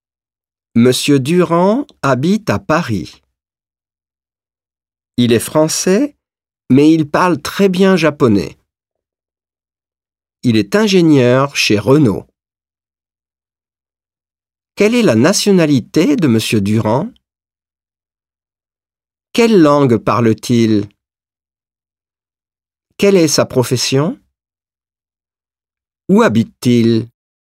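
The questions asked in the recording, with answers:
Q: Quelle est la nationalité de Monsieur Durand?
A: Il est français.

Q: Quelle langue parle-t-il?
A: Il parle japonais (et français).

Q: Quelle est sa profession?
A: Il est ingénieur chez Renault.

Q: Où habite-t-il?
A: À Paris.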